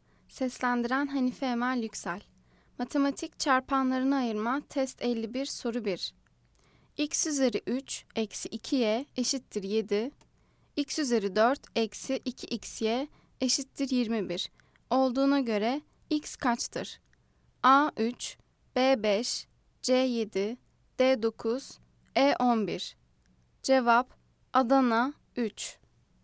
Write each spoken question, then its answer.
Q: X üzeri 3 eksi 2y eşittir 7. X üzeri 4 eksi 2xy eşittir 21. Olduğuna göre x kaçtır?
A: Cevap Adana 3.